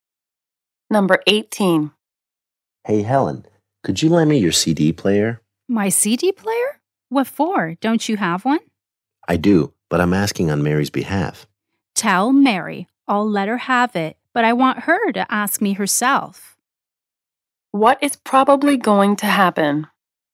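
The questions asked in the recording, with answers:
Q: What is probably going to happen?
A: Mary will ask Helen for the CD player herself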